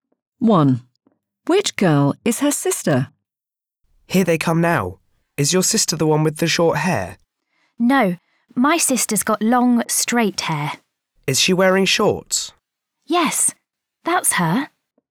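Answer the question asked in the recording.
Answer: The one with long, straight hair wearing shorts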